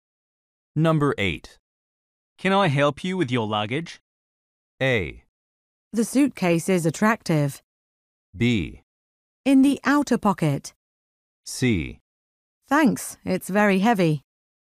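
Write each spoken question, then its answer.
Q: Can I help you with your luggage?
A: C: Thanks, it's very heavy.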